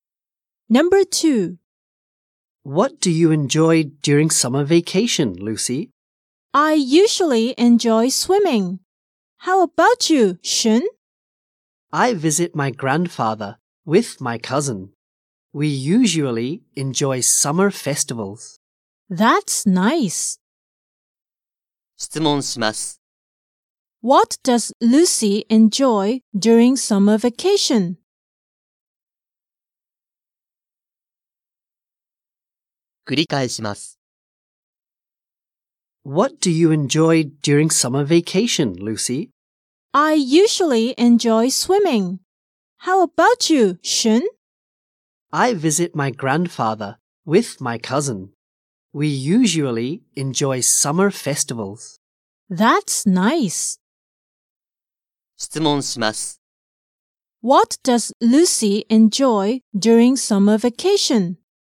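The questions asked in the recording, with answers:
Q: What does Lucy enjoy during summer vacation?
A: She enjoys swimming.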